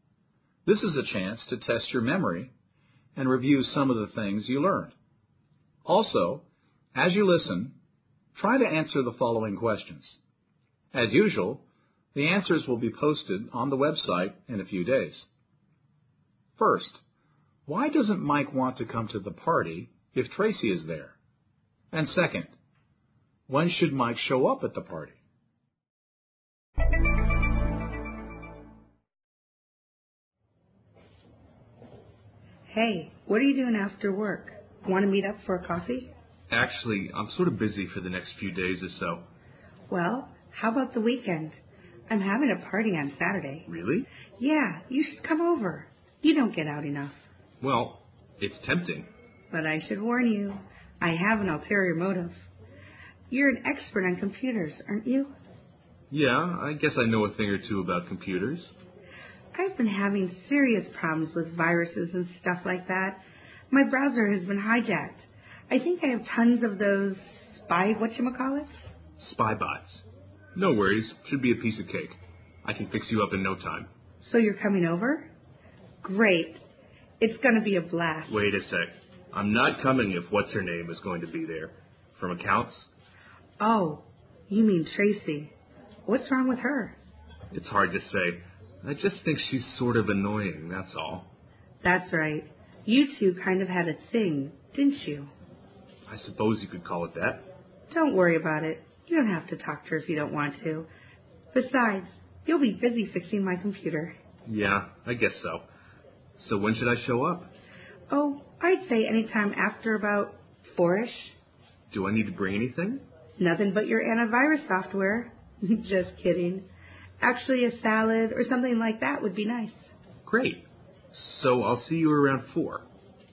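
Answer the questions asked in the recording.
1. He finds her annoying; they had a past relationship (a thing)
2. Anytime after about 4-ish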